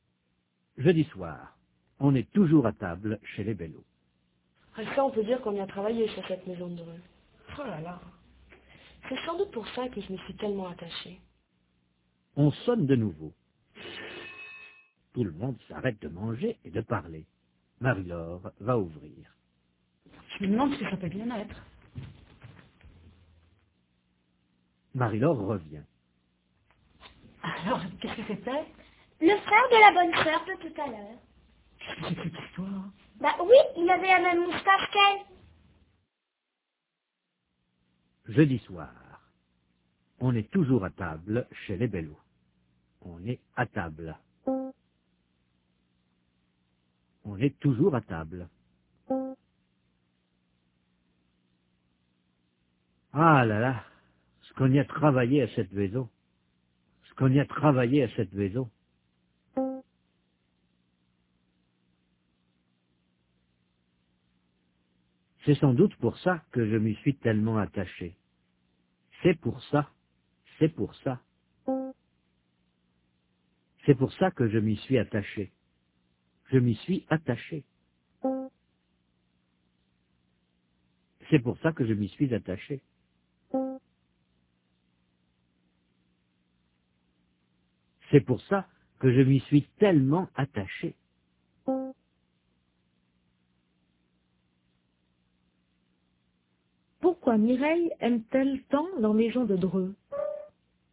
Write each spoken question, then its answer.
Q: Pourquoi Mireille aime-t-elle tant la maison de Dreux?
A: Parce qu'ils y ont beaucoup travaillé.